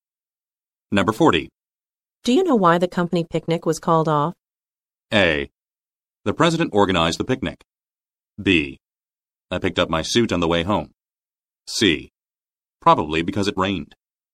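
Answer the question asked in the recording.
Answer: C: Probably because it rained.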